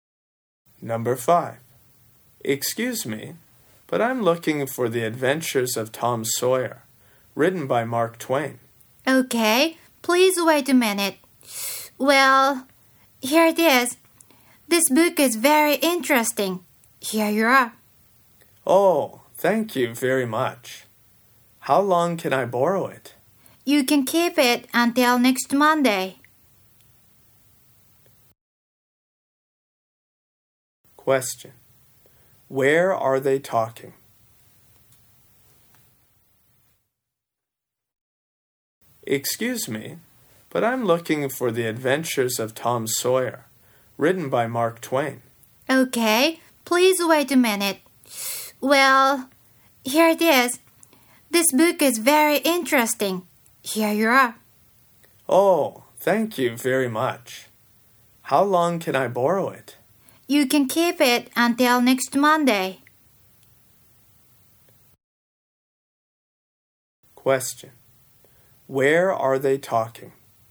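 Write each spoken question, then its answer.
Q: Where are they talking?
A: At a library.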